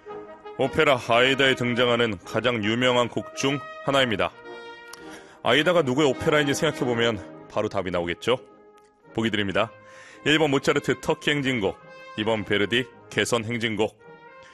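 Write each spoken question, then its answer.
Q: 오페라 아이다에 등장하는 가장 유명한 곡 중 하나입니다.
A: 2: 베르디 개선 행진곡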